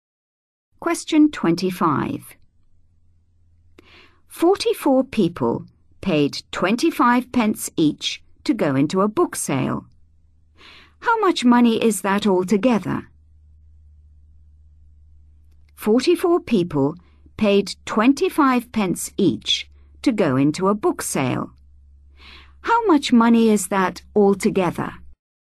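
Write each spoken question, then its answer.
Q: How much money is that altogether?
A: £11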